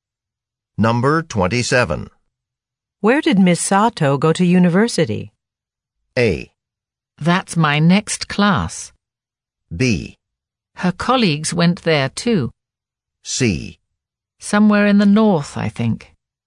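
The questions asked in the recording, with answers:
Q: Where did Miss Sato go to university?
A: C: Somewhere in the north, I think.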